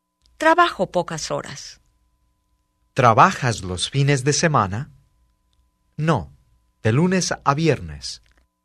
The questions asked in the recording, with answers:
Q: ¿Trabajas los fines de semana? No, de lunes a viernes.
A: No, trabajo de lunes a viernes.